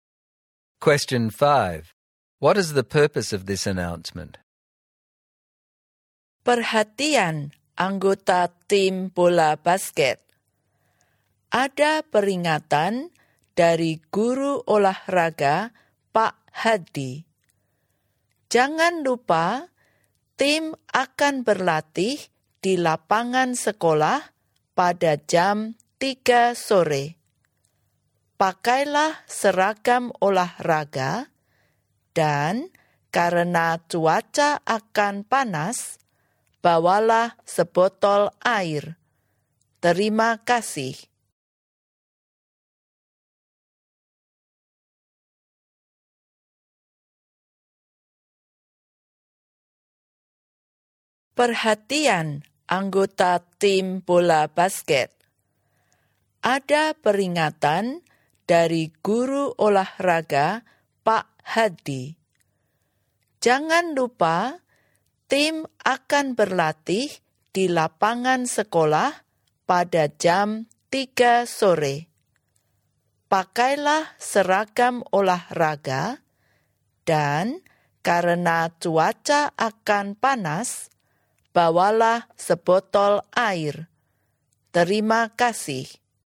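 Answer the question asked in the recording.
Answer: To remind the basketball team about practice at the school court at 3 pm, to wear sports uniform and bring a bottle of water.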